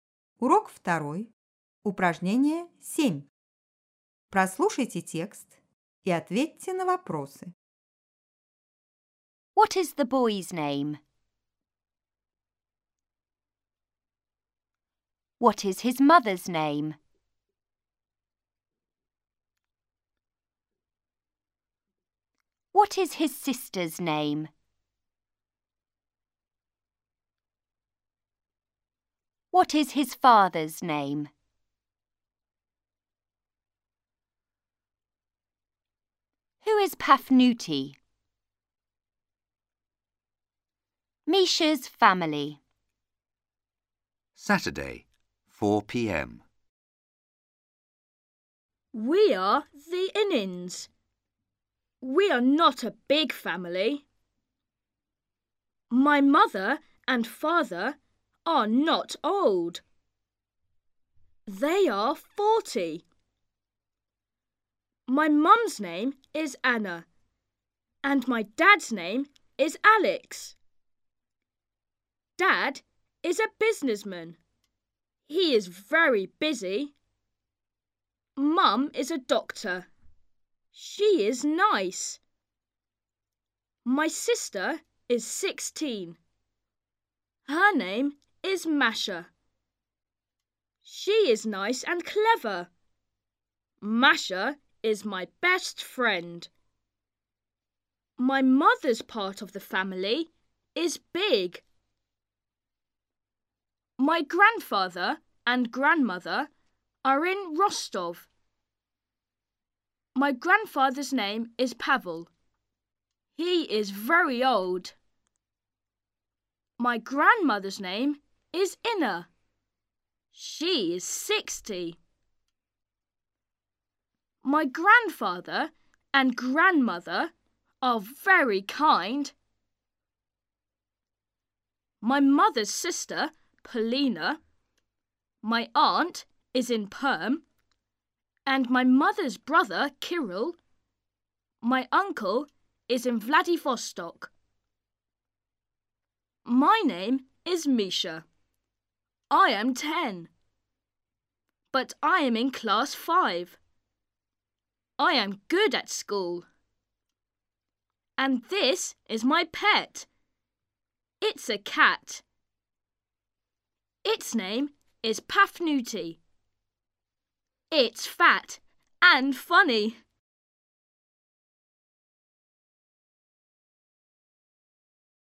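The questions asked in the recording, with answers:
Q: What is the boy's name?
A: Misha

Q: What is his mother's name?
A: Anna

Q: What is his sister's name?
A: Masha

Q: What is his father's name?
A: Alex

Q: Who is Pafnuti?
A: Misha's pet cat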